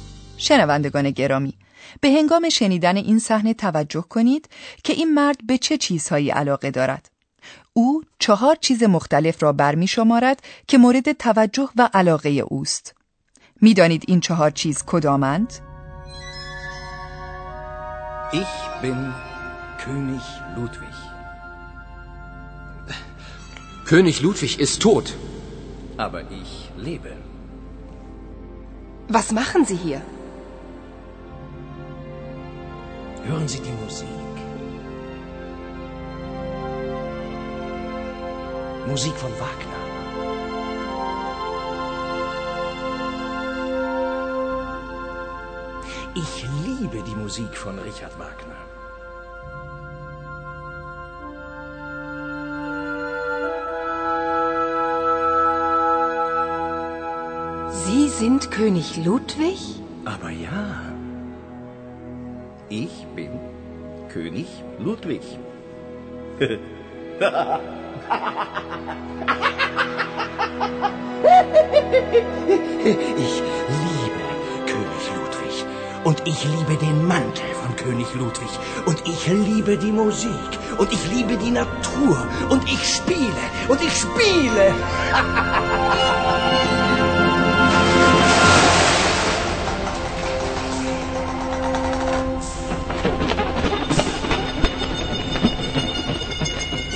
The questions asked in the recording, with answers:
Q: می دانید این 4 چیز کدامند؟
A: همانطور که شما هم حتما متوجه شدید، این مرد عاشق موسیقی است، عاشق آثار ریچارد واگنر.